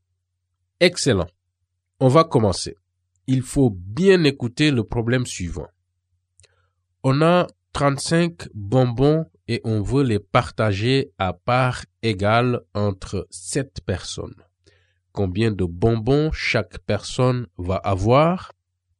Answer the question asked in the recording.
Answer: Si je divise 35 par 7, je trouve 5.